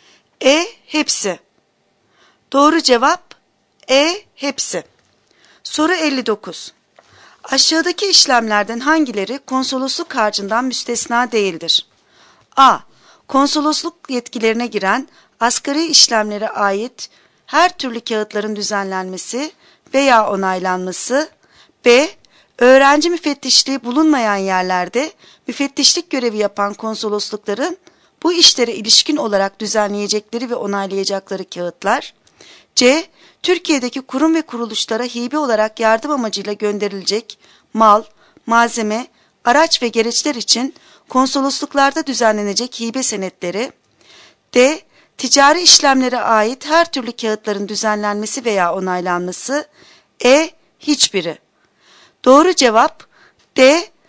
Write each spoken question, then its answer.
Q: Aşağıdaki işlemlerden hangileri konsolosluk harcından müstesna değildir?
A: Doğru cevap D.